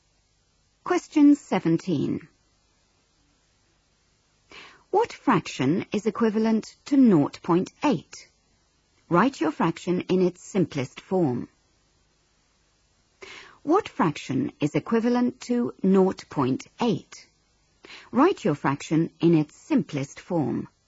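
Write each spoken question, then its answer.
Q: What fraction is equivalent to 0.8?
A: 4/5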